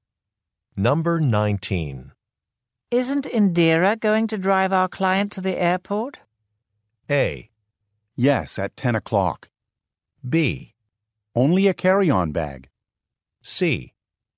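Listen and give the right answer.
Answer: A: Yes, at 10 o'clock.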